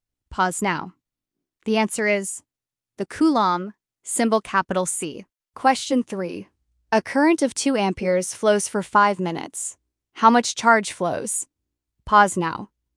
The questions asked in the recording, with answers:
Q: a current of 2 amperes flows for 5 minutes. How much charge flows?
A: Then Q equals I times T equals 2 times 300 equals 600 coulombs.